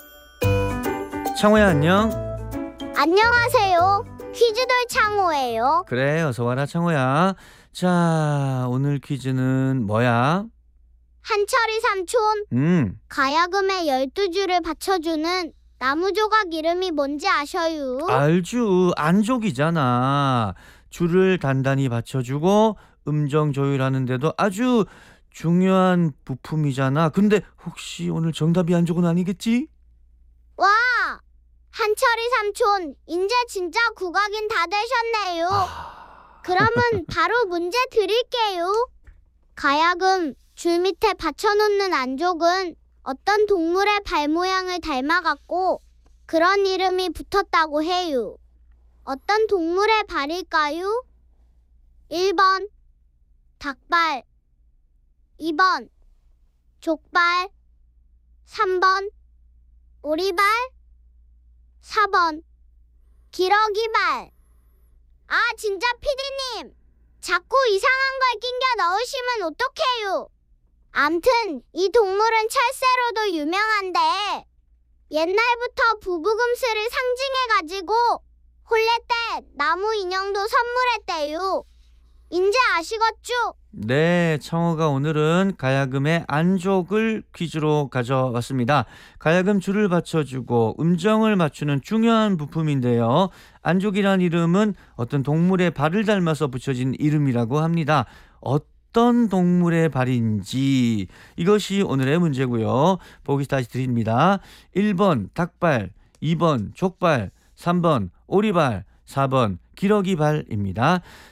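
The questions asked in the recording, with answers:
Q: 어떤 동물의 발일까요? 1번 닭발, 2번 족발, 3번 오리발, 4번 기러기발.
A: 4: 기러기발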